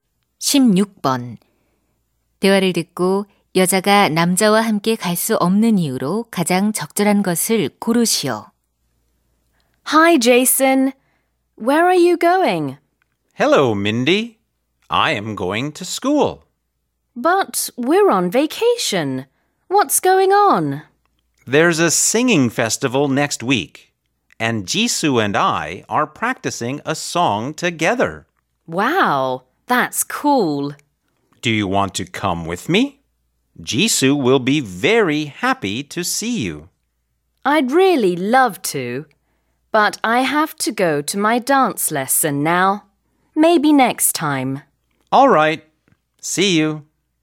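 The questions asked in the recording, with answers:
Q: 대화를 듣고 여자가 남자와 함께 갈 수 없는 이유로 가장 적절한 것을 고르시오.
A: 춤 수업에 가야 해서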